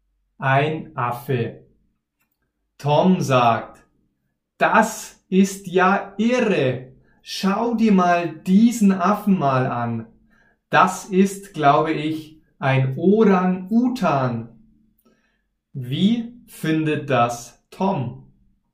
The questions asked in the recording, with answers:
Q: Wie findet das Tom?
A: Er findet das irre.